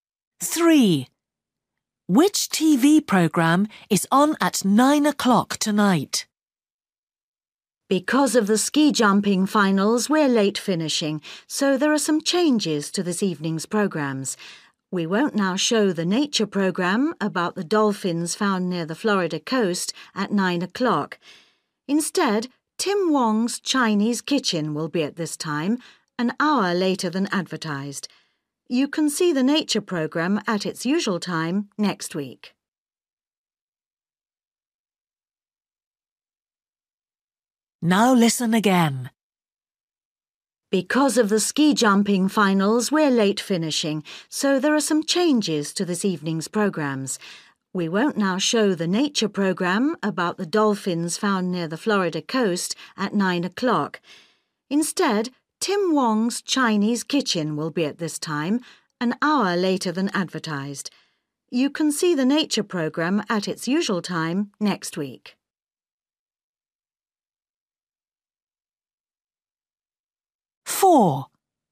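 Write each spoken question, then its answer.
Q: Which TV programme is on at 9 o'clock tonight?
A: Tim Wong's Chinese Kitchen (a cookery programme)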